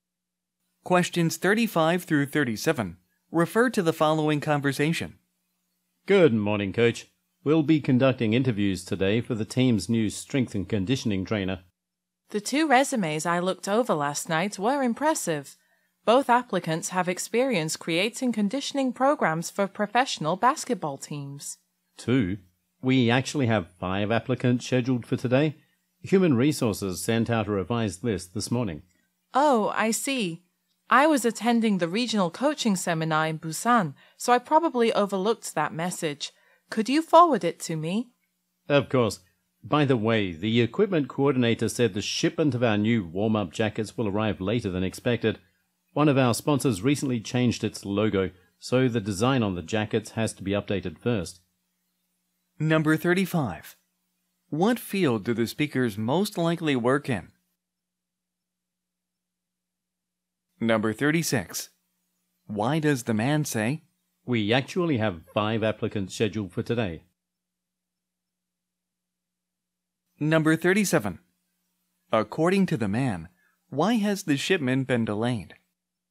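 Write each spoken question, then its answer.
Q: What field do the speakers most likely work in?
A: Professional sports (a basketball team)

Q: According to the man, why has the shipment been delayed?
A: A sponsor changed its logo, so the jacket design must be updated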